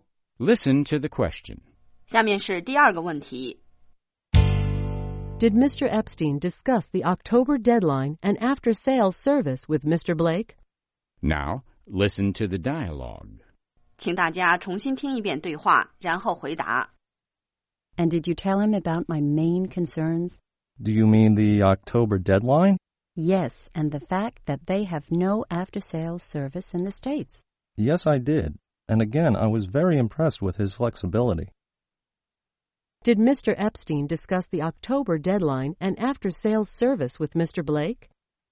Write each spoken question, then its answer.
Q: Did Mr. Epstein discuss the October deadline and after-sales service with Mr. Blake?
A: Yes, he did.He discussed these issues with Mr. Blake.